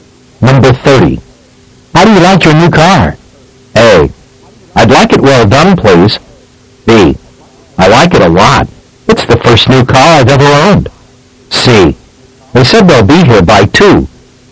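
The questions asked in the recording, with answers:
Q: How do you like your new car?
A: B: I like it a lot. It's the first new car I've ever owned.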